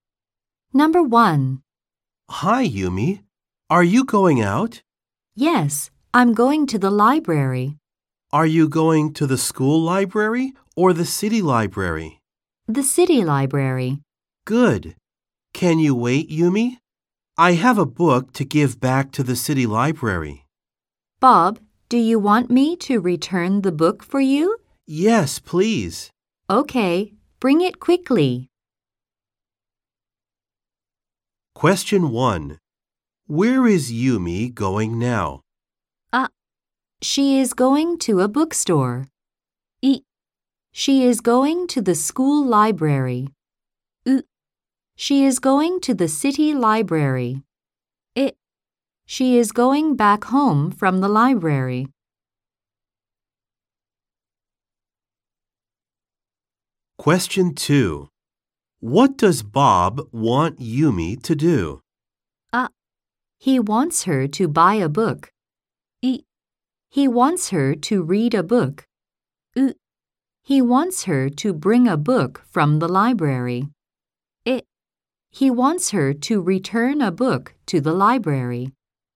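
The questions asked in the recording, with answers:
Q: Where is Yumi going now?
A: う: She is going to the city library.

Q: What does Bob want Yumi to do?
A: え: He wants her to return a book to the library.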